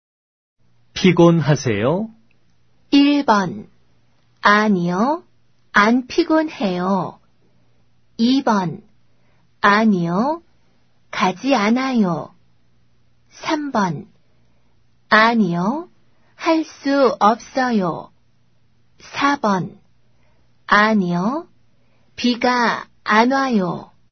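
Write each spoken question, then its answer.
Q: 피곤하세요?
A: 1: 아니요, 안 피곤해요.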